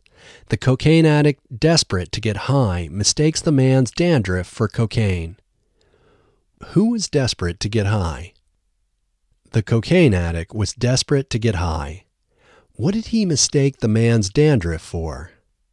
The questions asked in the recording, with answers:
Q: What did he mistake the man's dandruff for?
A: He mistakes the man's dandruff for cocaine.